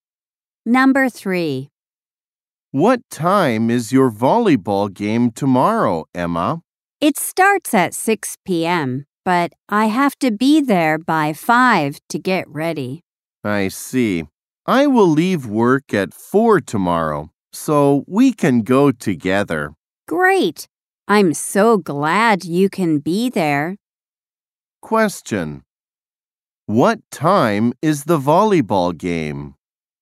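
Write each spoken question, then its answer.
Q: What time is the volleyball game?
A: At 6 p.m.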